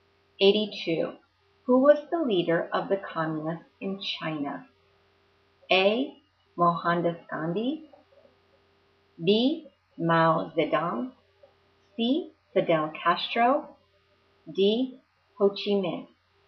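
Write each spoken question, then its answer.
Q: Who was the leader of the communists in China?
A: B: Mao Zedong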